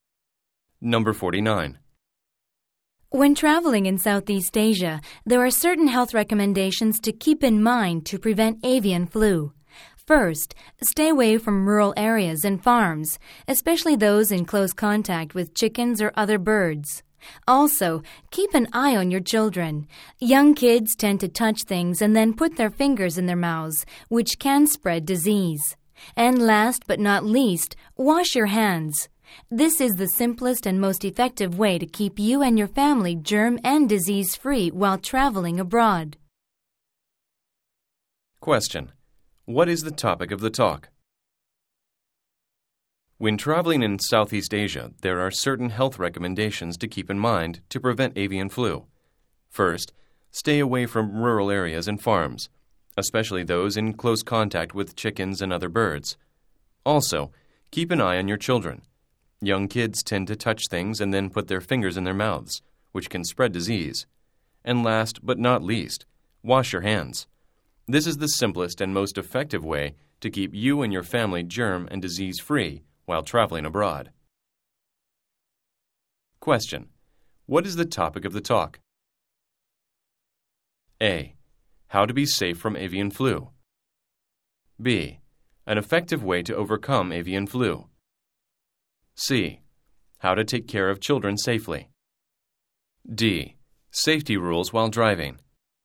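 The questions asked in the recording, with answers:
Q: What is the topic of the talk?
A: A: How to be safe from avian flu.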